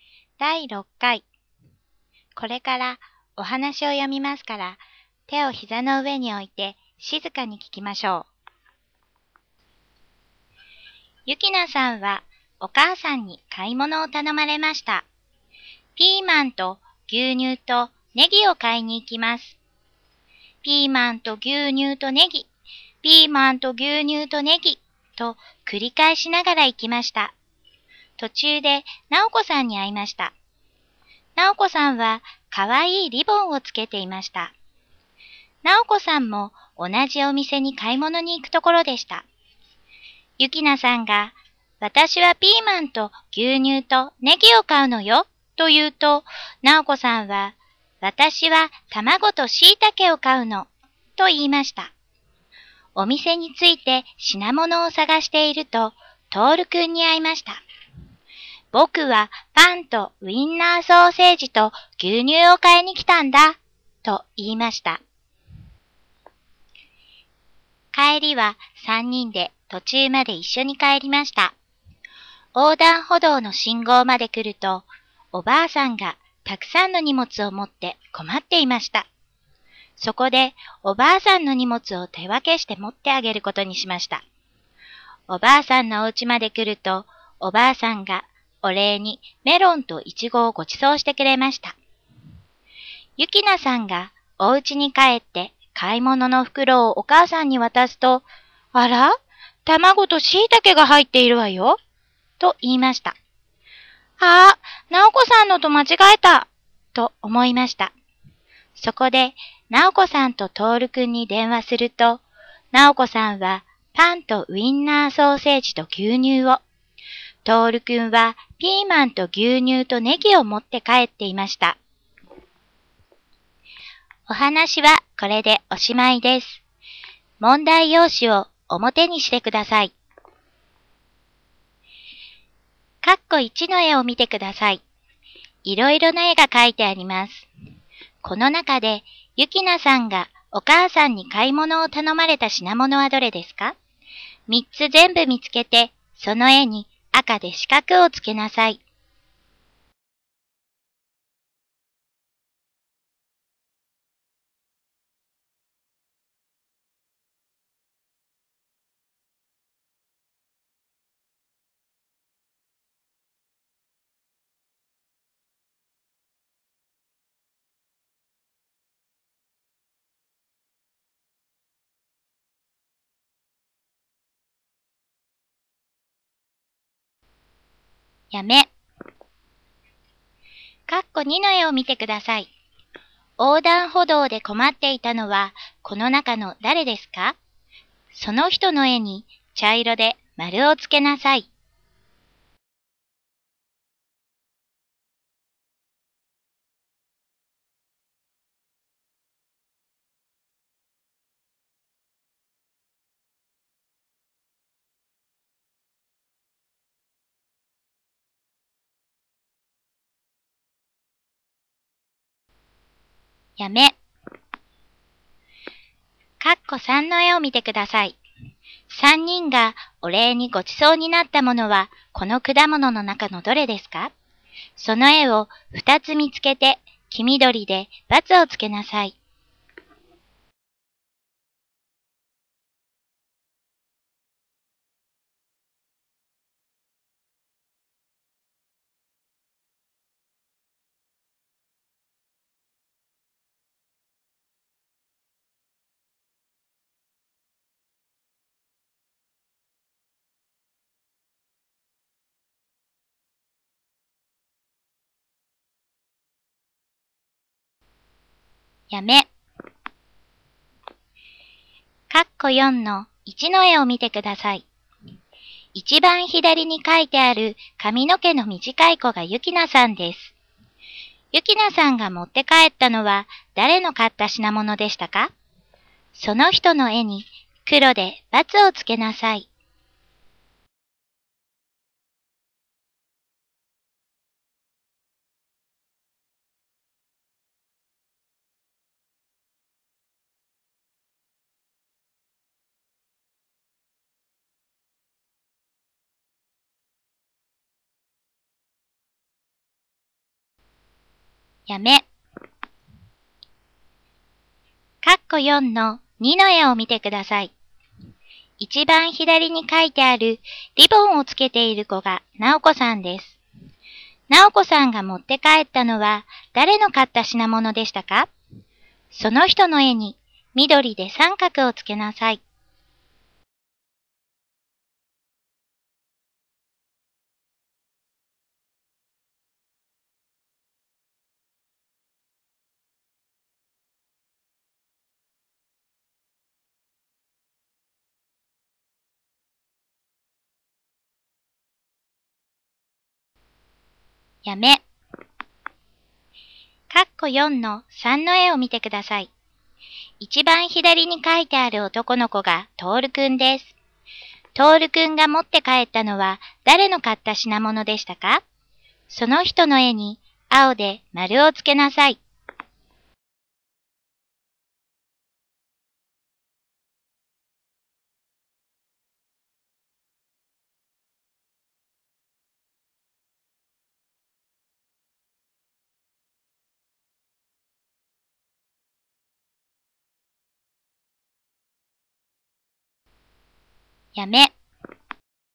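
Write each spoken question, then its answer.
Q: この中でゆきなさんがお母さんに買い物を頼まれた品物はどれですか ?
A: ピーマンと牛乳とネギ

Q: 横断歩道で困っていたのは、この中の誰ですか?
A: おばあさん

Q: 3人がお礼にごちそうになったものは、この果物の中のどれですか?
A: メロンとイチゴ

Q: ゆきなさんが持って帰ったのは誰の買った品物でしたか?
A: なおこさん

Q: 直子さんが持って帰ったのは誰の買った品物でしたか?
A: トールくん

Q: トールくんが持って帰ったのは誰の買った品物でしたか?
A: ゆきなさん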